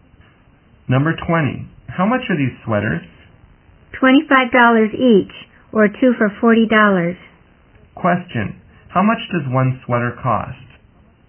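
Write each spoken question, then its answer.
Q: Question, how much does one sweater cost?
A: $25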